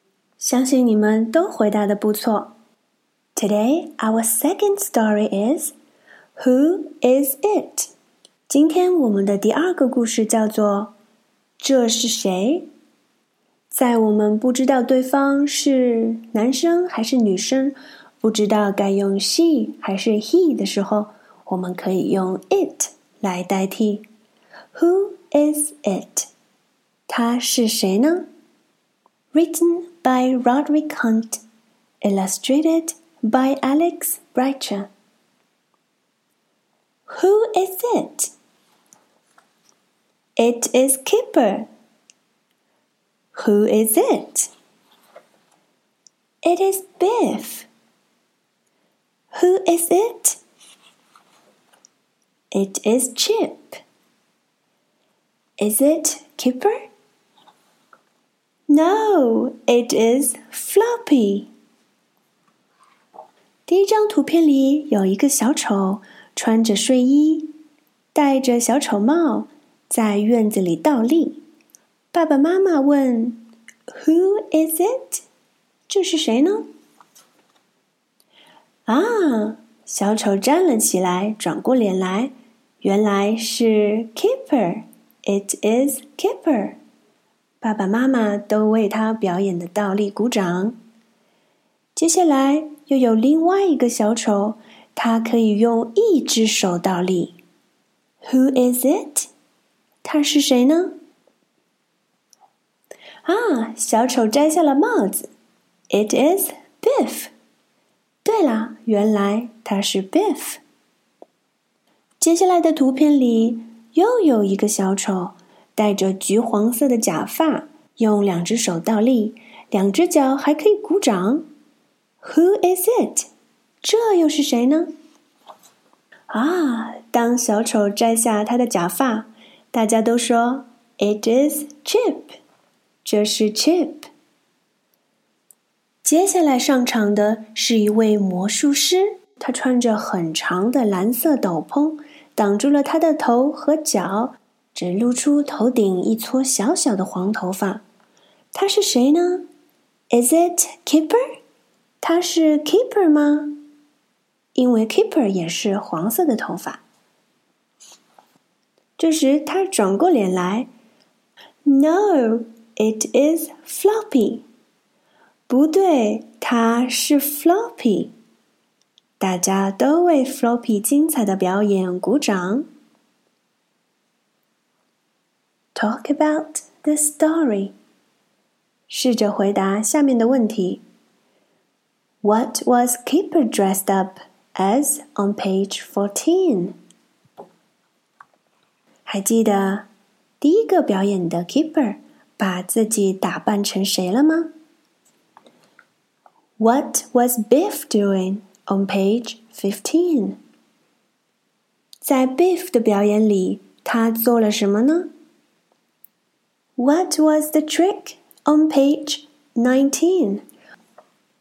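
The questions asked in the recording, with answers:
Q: What was Kipper dressed up as on page 14?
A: A clown

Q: What was Biff doing?On page 15.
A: A handstand on one hand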